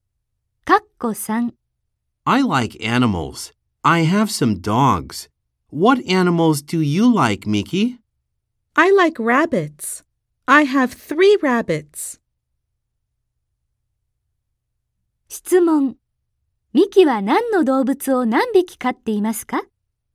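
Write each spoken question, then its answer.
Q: ミキは何の動物を何匹飼っていますか?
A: ウサギを3匹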